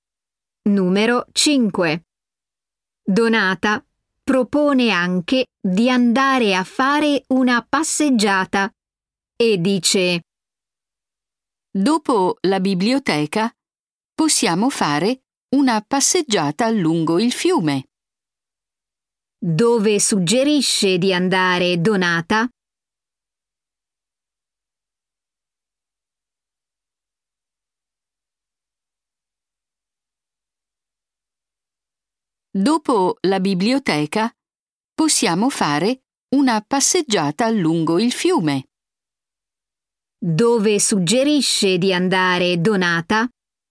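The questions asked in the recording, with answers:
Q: Dove suggerisce di andare Donata?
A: a fare una passeggiata lungo il fiume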